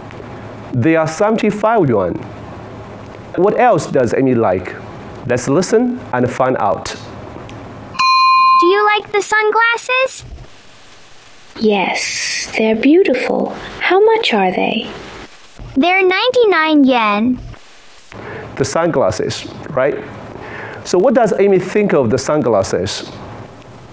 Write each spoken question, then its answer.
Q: So what does Amy think of the sunglasses?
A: They are beautiful.